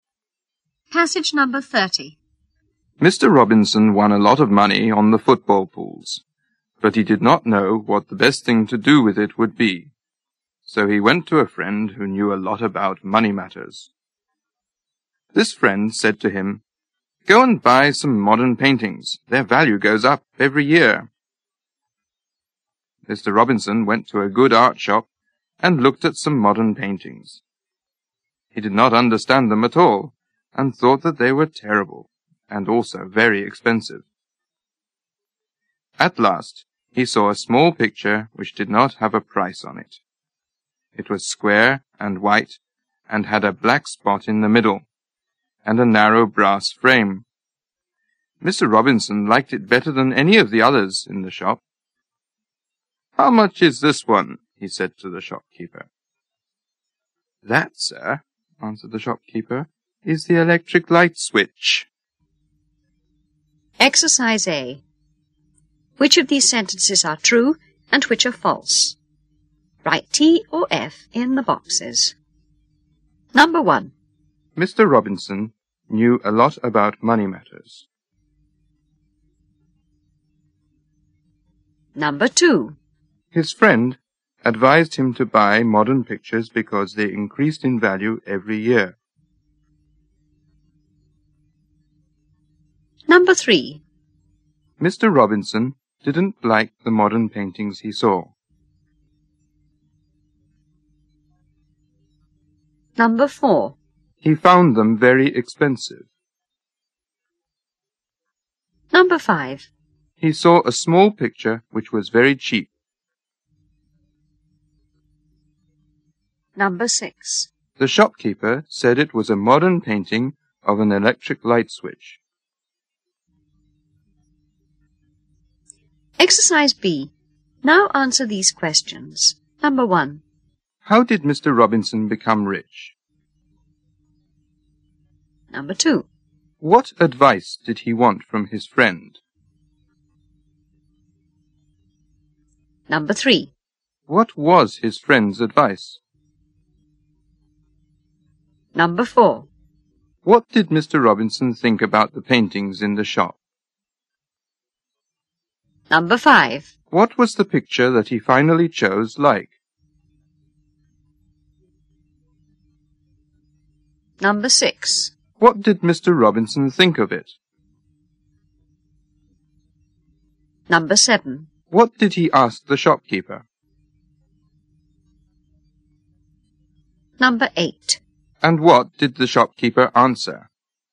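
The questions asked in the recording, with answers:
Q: How did Mr. Robinson become rich?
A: He won a lot of money on the football pools.

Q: What advice did he want from his friend?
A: What the best thing to do with the money would be.

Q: What was his friend's advice?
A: To buy modern paintings, because their value goes up every year.

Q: What did Mr. Robinson think about the paintings in the shop?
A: He didn't understand them and thought they were terrible and very expensive.

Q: What was the picture that he finally chose like?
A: Small, square and white, with a black spot in the middle and a narrow brass frame.

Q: What did Mr. Robinson think of it?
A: He liked it better than any of the others in the shop.

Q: What did he ask the shopkeeper?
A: How much it was.

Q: And what did the shopkeeper answer?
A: That it was the electric light switch.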